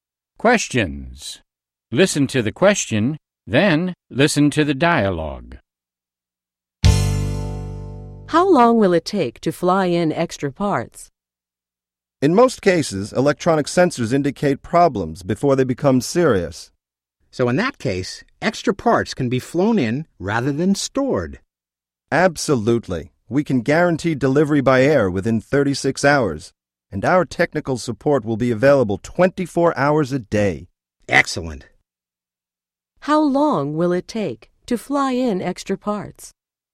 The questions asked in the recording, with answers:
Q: How long will it take to fly in extra parts?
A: It will take 36 hours or less.